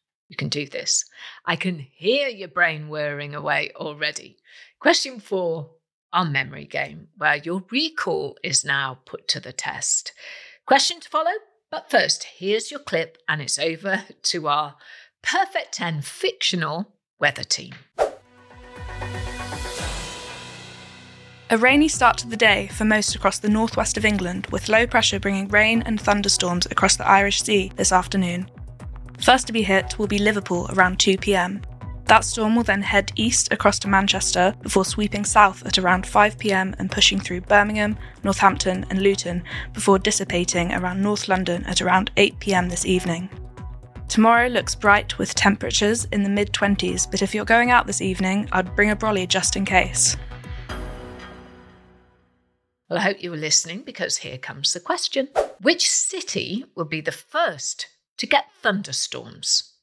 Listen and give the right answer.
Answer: Well, the answer was Liverpool.